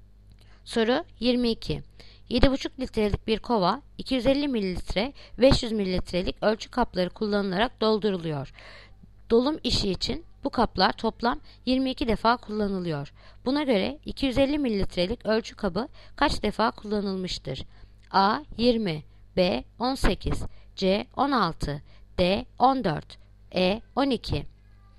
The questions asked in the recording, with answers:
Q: Buna göre 250 mililitrelik ölçü kabı kaç defa kullanılmıştır?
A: Yanıt Diyarbakır 14.